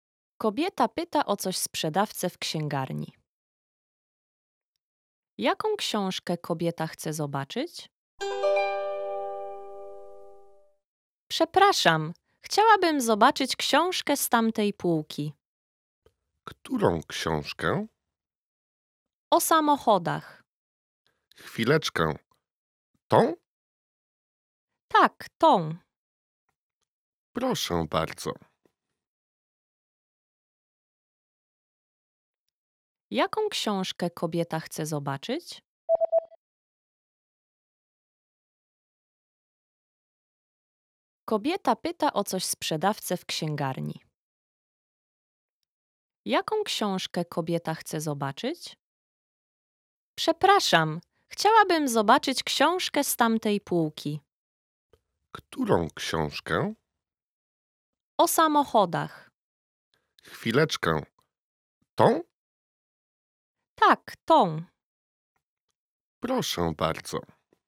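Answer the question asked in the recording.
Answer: Książkę o samochodach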